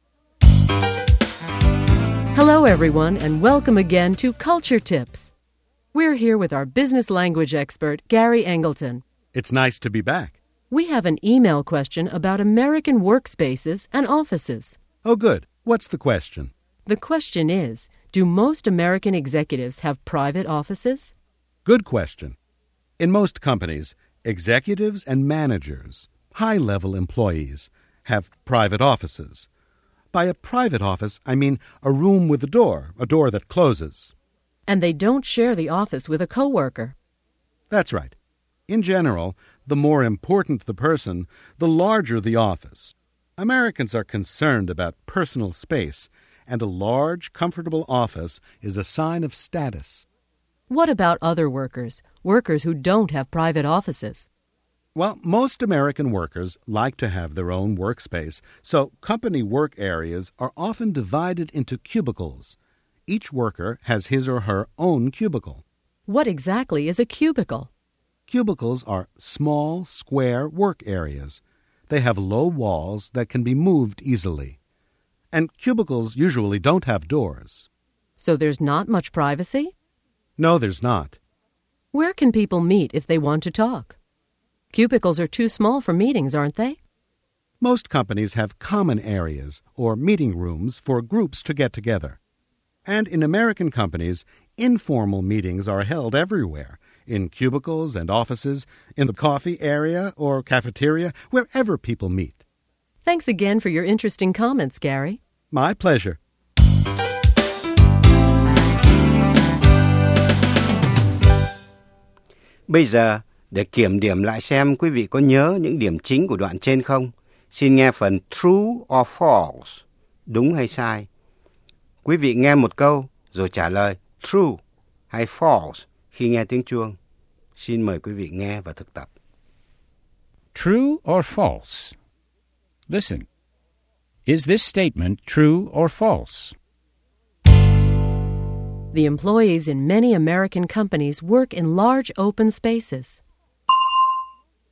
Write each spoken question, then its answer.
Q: The employees in many American companies work in large open spaces.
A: False. Most Americans work in private offices or cubicles.